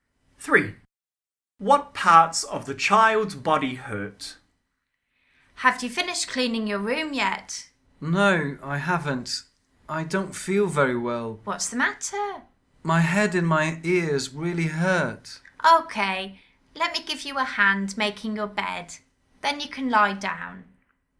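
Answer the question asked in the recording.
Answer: Head and ears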